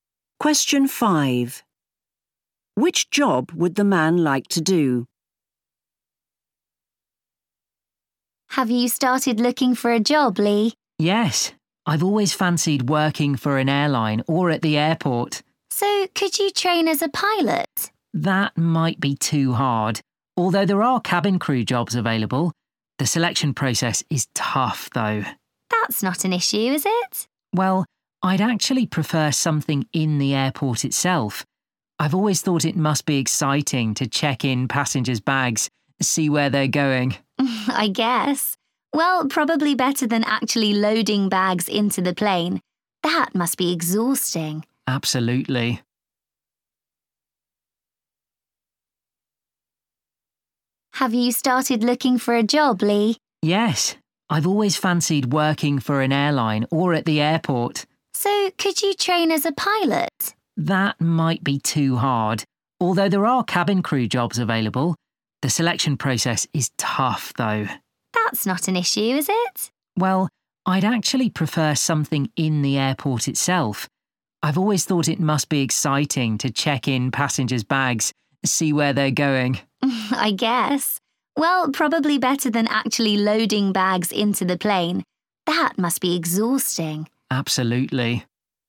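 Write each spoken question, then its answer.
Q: Which job would the man like to do?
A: checking in passengers' bags at the airport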